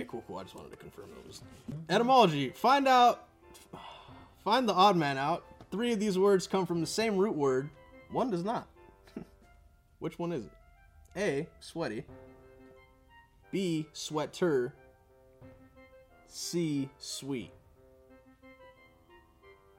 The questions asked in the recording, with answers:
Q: Three of these words come from the same root word.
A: Correct.